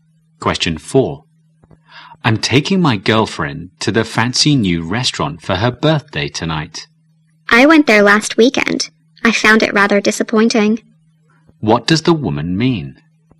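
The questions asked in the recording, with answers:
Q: What does the woman mean?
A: The new restaurant is disappointing.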